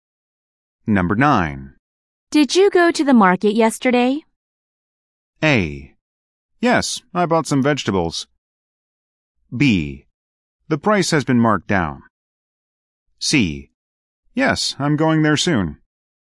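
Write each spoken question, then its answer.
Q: Did you go to the market yesterday?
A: A: Yes, I bought some vegetables.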